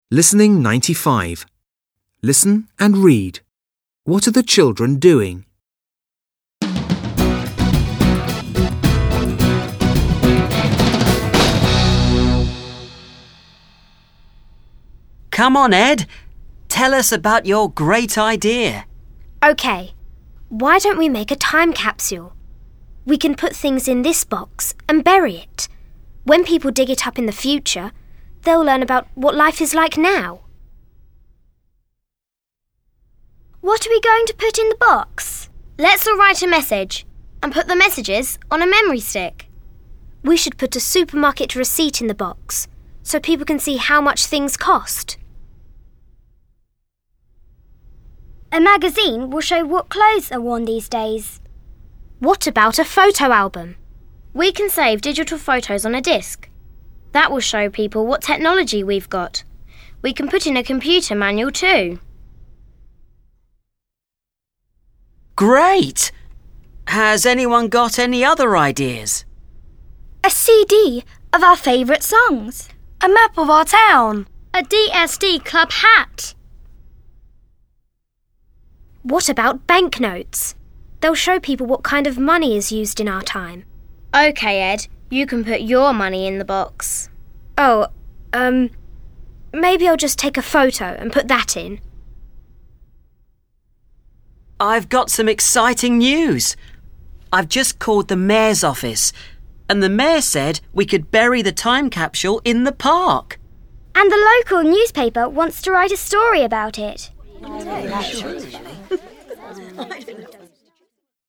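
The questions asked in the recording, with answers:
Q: What are the children doing?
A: They are planning a time capsule to bury.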